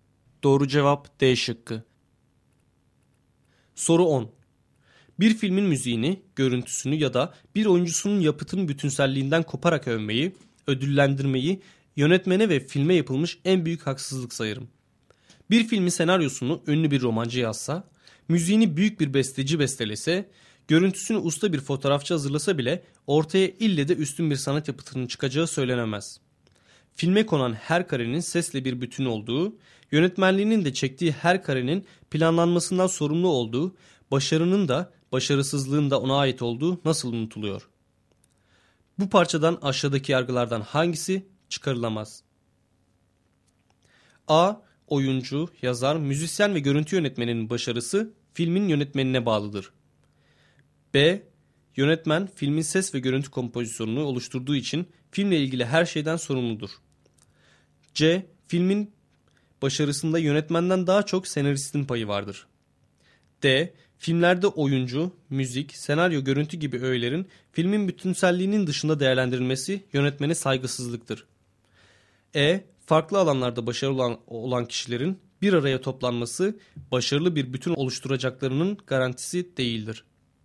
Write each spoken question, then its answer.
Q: Bu parçadan aşağıdaki yargılardan hangisi çıkarılamaz?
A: Doğru cevap C şıkkı.